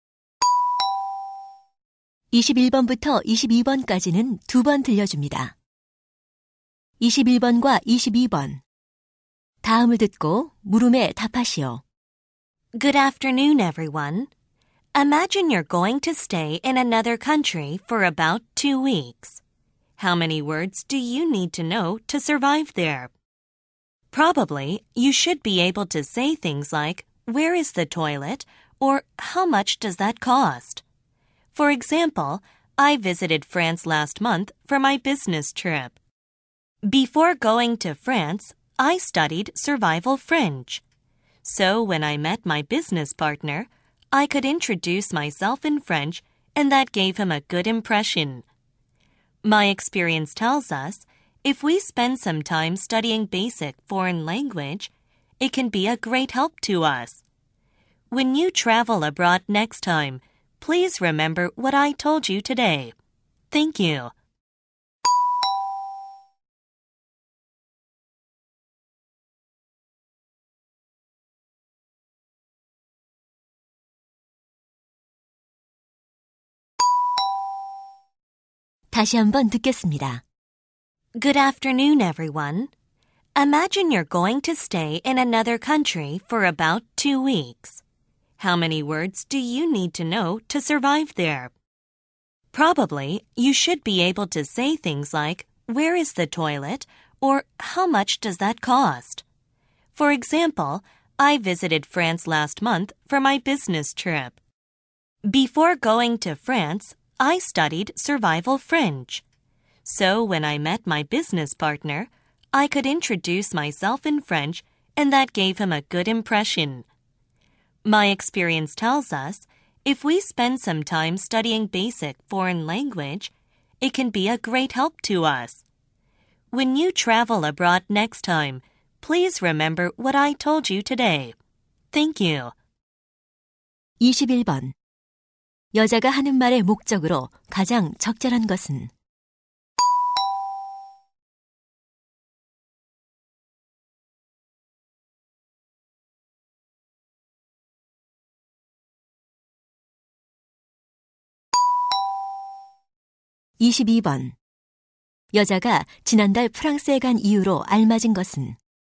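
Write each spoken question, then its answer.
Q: 21번 여자가 하는 말의 목적으로 가장 적절한 것은?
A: 해외여행 전 기초 외국어를 공부하도록 권하려고

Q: 여자가 지난달 프랑스에 간 이유로 알맞은 것은?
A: 출장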